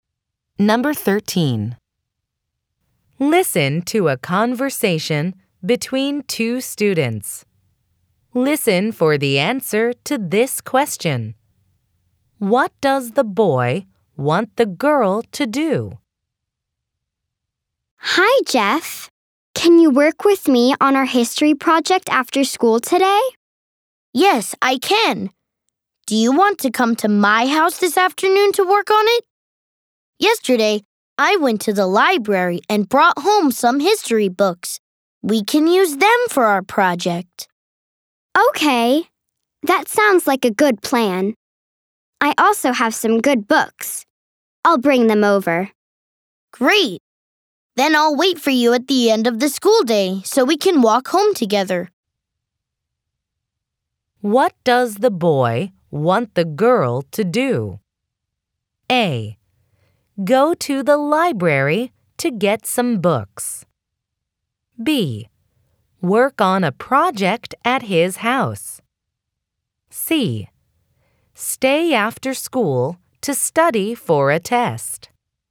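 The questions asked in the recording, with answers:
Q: What does the boy want the girl to do?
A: B: Work on a project at his house.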